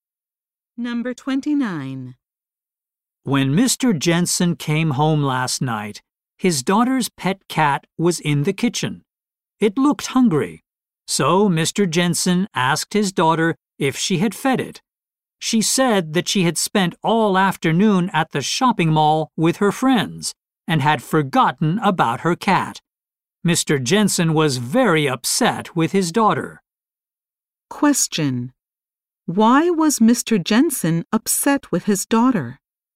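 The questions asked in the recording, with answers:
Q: Why was Mr. Jensen upset with his daughter?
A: She forgot to feed her cat.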